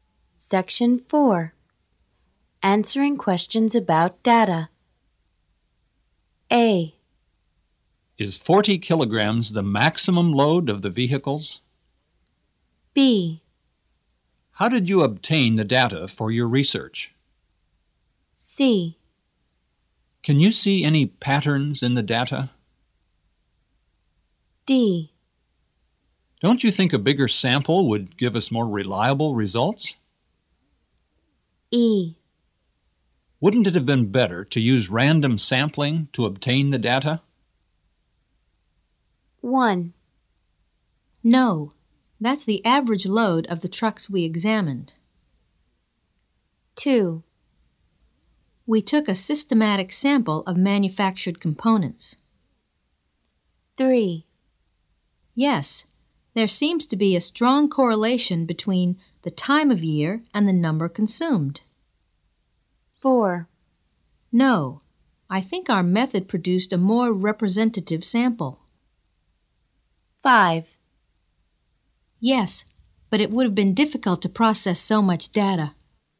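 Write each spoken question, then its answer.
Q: No, that's the average load of the trucks we examined.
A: A: Is 40 kilograms the maximum load of the vehicles?

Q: We took a systematic sample of manufactured components.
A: B: How did you obtain the data for your research?

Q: Yes, there seems to be a strong correlation between the time of year and the number consumed.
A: C: Can you see any patterns in the data?

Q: No, I think our method produced a more representative sample.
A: E: Wouldn't it have been better to use random sampling to obtain the data?

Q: Yes, but it would have been difficult to process so much data.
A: D: Don't you think a bigger sample would give us more reliable results?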